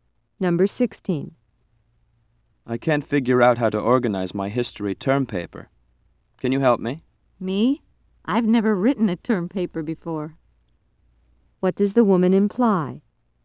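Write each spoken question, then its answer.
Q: What does the woman imply?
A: She can't help him because she's never written a term paper.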